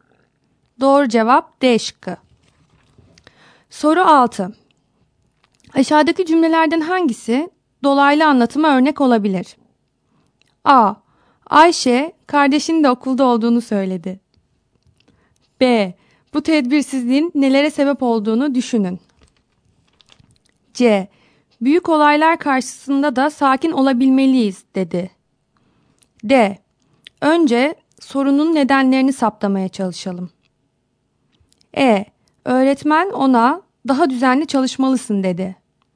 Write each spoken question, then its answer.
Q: Aşağıdaki cümlelerden hangisi dolaylı anlatıma örnek olabilir?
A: Doğru cevap A şıkkı.